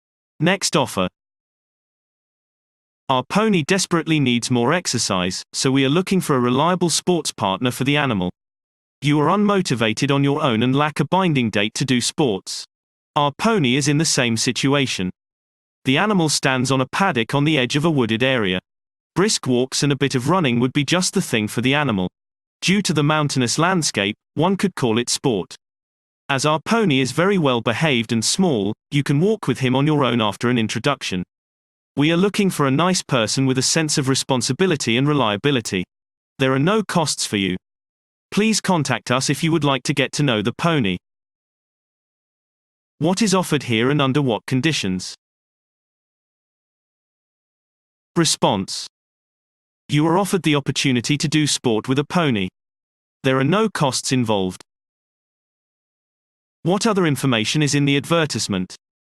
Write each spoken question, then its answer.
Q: What other information is in the advertisement?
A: The pony urgently needs more exercise.